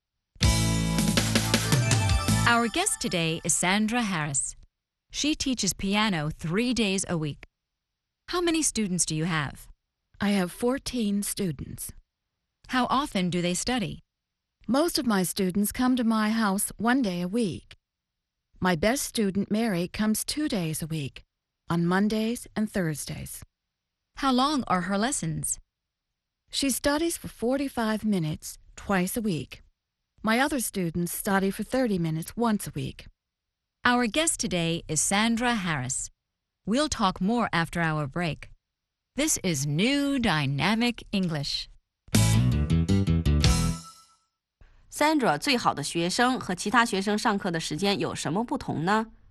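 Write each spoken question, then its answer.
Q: Sandra, 最好的学生和其他学生上课的时间有什么不同呢?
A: 最好的学生Mary每星期上两次课,每次45分钟;其他学生每星期一次,每次30分钟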